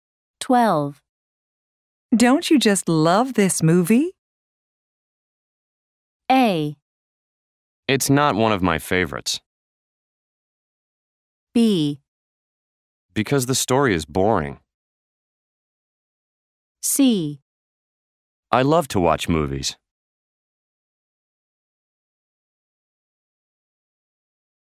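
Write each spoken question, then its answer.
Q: Don't you just love this movie?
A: A: It's not one of my favorites.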